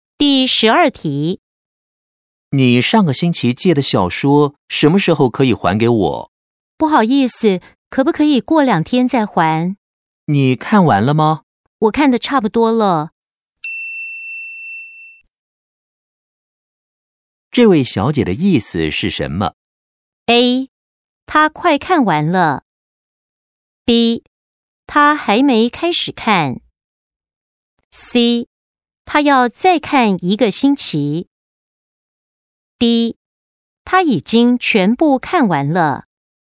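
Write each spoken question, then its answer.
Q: 这位小姐的意思是什么?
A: A: 她快看完了。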